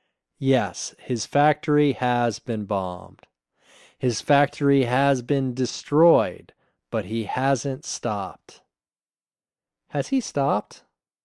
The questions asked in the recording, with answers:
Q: Has he stopped?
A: No, he hasn't stopped.